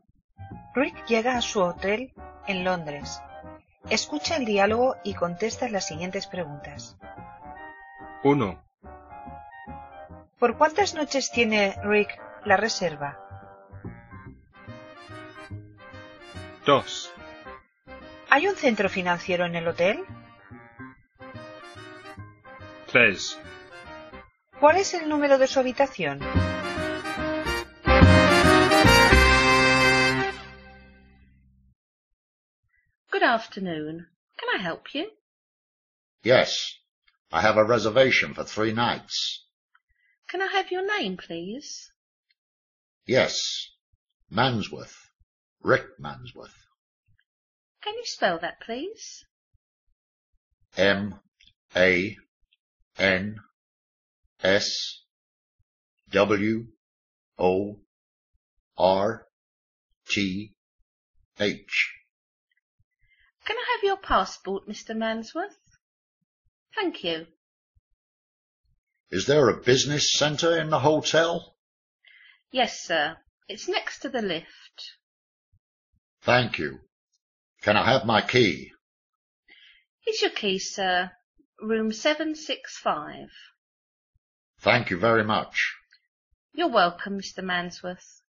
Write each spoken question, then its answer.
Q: ¿Por cuántas noches tiene Rick la reserva?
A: For 3 nights.

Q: ¿Hay un centro financiero en el hotel?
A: Yes, there is.

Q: ¿Cuál es el número de su habitación?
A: 765.